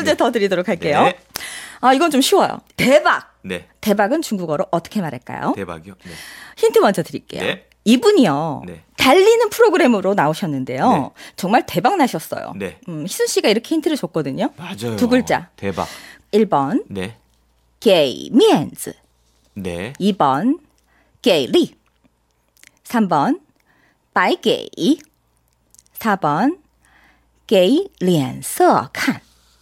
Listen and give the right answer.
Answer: 2번. 정답입니다.